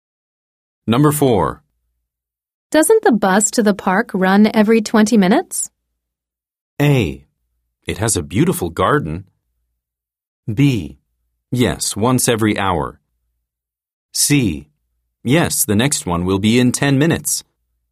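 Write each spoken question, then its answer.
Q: Doesn't the bus to the park run every 20 minutes?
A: C: Yes, the next one will be in 10 minutes.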